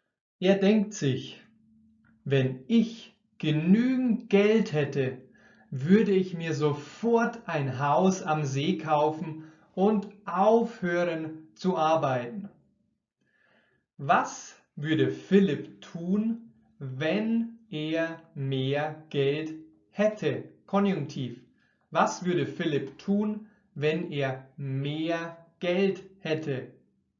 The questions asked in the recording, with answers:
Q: Was würde Philipp tun, wenn er mehr Geld hätte?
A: Er würde sich sofort ein Haus am See kaufen und aufhören zu arbeiten?